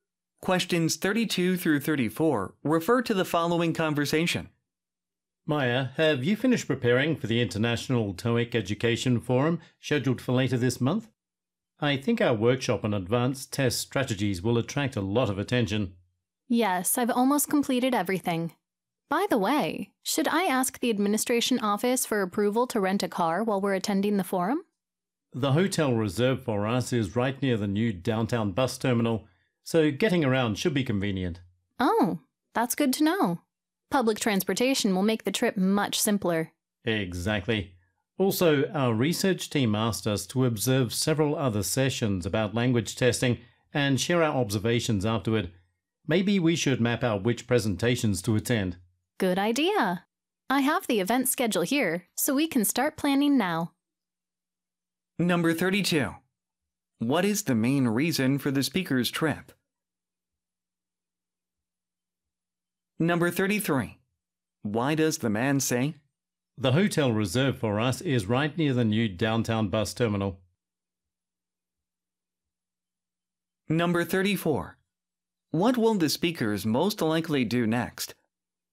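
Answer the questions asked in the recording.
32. To attend the International TOEIC Education Forum and give a workshop
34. Plan which presentations to attend using the event schedule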